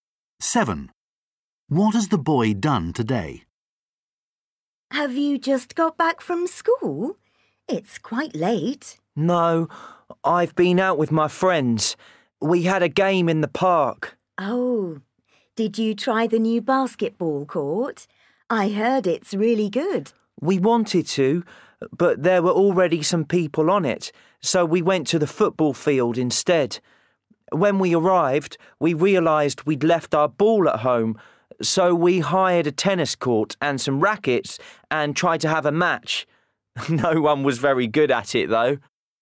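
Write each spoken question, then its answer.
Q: What has the boy done today?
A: Played tennis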